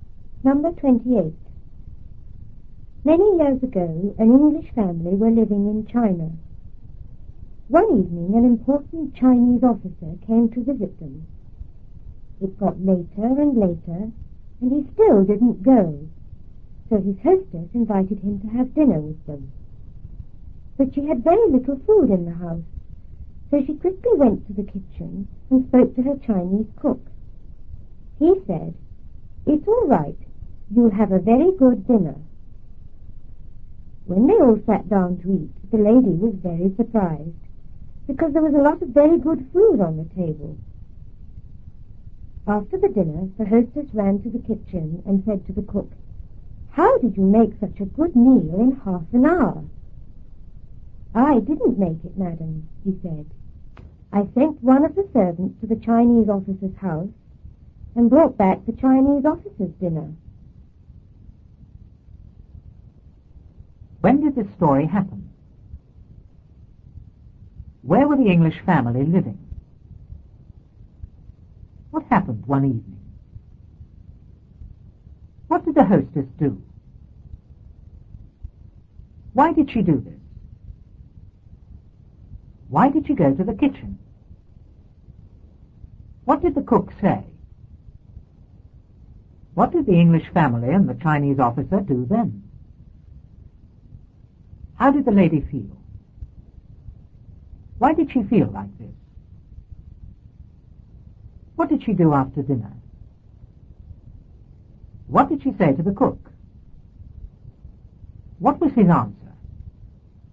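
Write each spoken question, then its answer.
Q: When did this story happen?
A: Many years ago

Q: Where were the English family living?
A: In China

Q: What happened one evening?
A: An important Chinese officer came to visit them

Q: What did the hostess do?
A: She invited him to have dinner with them

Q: Why did she go to the kitchen?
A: She had very little food, so she went to speak to her cook

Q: What did the cook say?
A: It's all right. You'll have a very good dinner.

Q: How did the lady feel?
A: Very surprised

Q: Why did she feel like this?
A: There was a lot of very good food on the table

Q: What did she do after dinner?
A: She ran to the kitchen to talk to the cook

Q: What did she say to the cook?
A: How did you make such a good meal in half an hour?

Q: What was his answer?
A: He sent a servant to bring back the Chinese officer's own dinner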